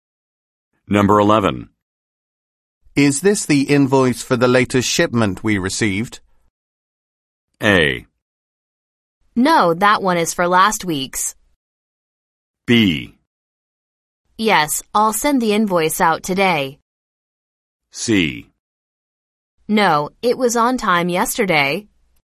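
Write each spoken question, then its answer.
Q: Is this the invoice for the latest shipment we received?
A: A: No, that one is for last week's.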